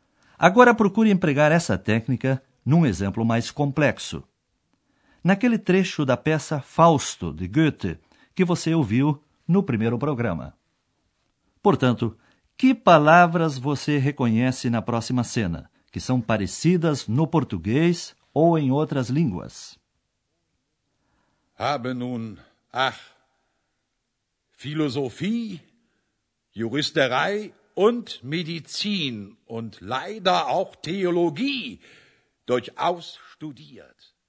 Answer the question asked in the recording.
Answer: Você conseguiu identificar filosofia, filosofia, medicina, medicina e teologia, teologia.